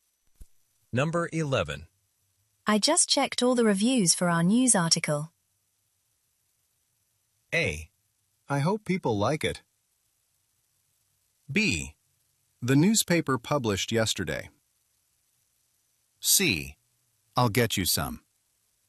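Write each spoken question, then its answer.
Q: I just checked all the reviews for our news article.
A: A: I hope people like it.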